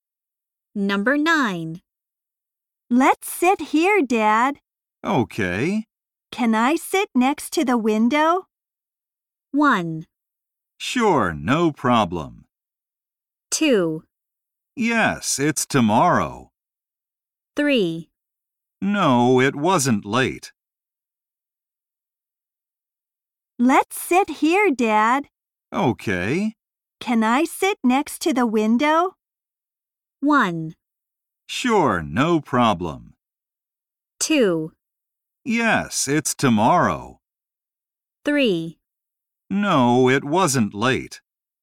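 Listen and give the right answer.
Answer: 1: Sure, no problem.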